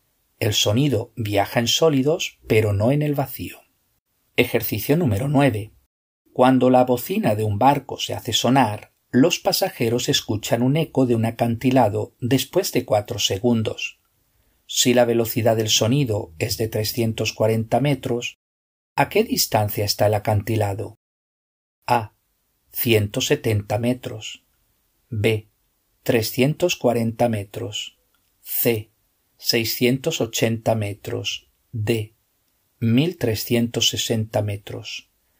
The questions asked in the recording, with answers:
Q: Si la velocidad del sonido es de 340 metros, ¿a qué distancia está el acantilado?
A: La respuesta correcta es la C.